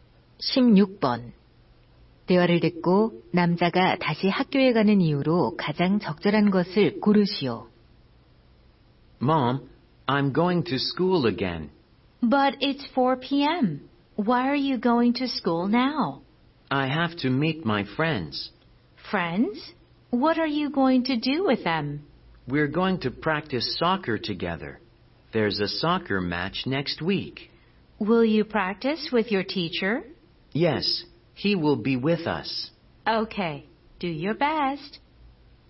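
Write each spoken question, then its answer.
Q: 대화를 듣고 남자가 다시 학교에 가는 이유로 가장 적절한 것을 고르시오.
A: 친구들과 축구 연습을 하려고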